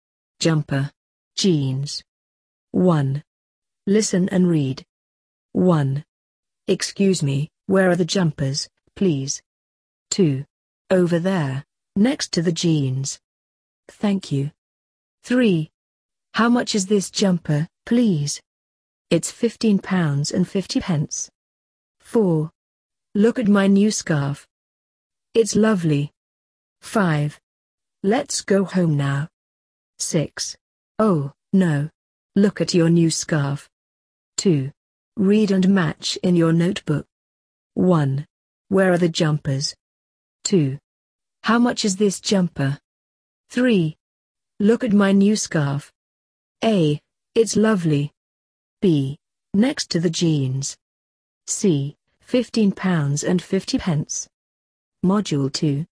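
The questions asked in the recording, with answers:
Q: Where are the jumpers?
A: B: Next to the jeans.

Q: How much is this jumper?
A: C: £15.50.

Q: Look at my new scarf.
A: A: It's lovely.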